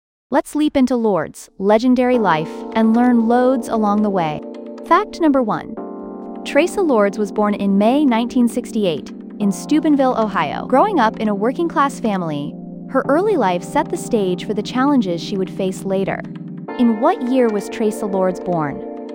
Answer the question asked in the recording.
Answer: Correct answer, 1968.